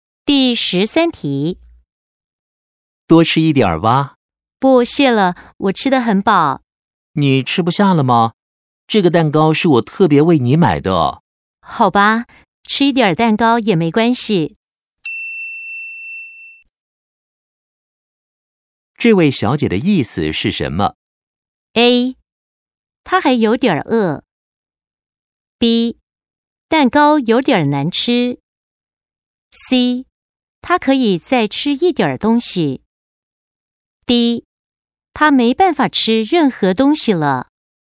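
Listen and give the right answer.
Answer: C: 他可以再吃一点东西。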